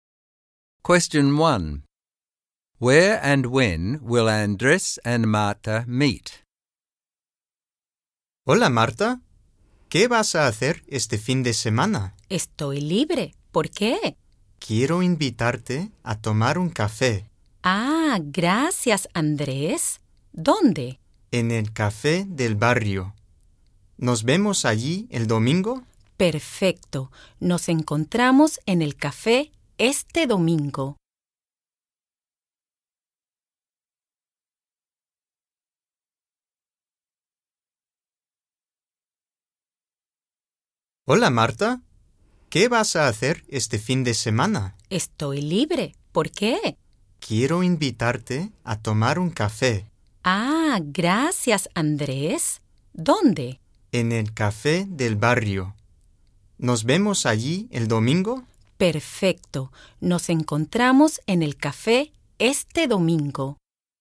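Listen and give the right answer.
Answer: At the neighbourhood café on Sunday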